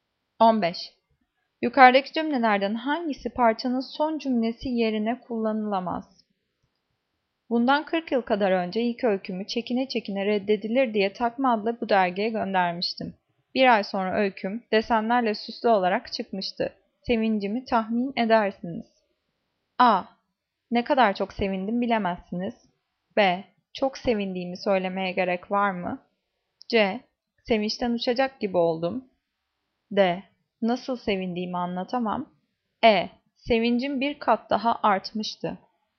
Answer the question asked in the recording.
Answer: Cevap E. Sevincim bir kat daha artmıştı.